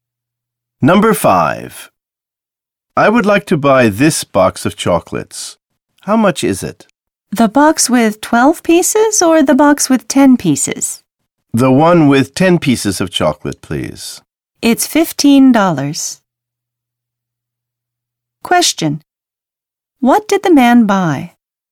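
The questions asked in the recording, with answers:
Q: What did the man buy?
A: A box with 10 pieces of chocolate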